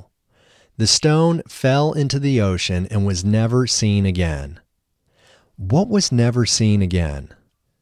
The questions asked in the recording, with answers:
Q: What was never seen again?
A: The stone was never seen again.